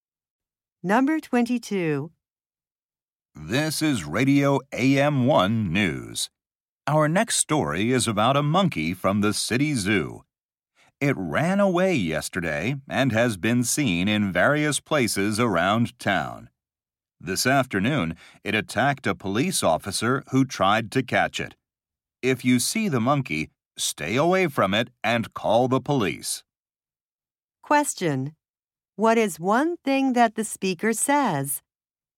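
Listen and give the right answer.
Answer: A monkey that ran away from the zoo attacked a police officer.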